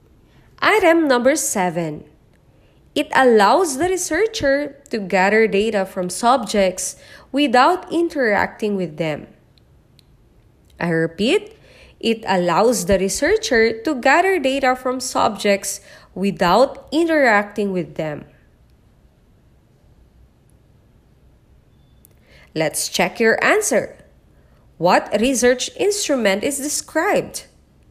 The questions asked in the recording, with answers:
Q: What research instrument is described?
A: It's letter B, observation.